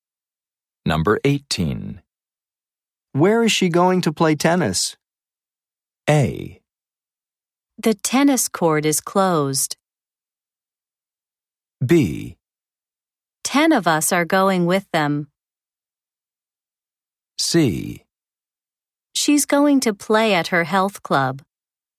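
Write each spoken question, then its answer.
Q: Where is she going to play tennis?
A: C: She's going to play at her health club.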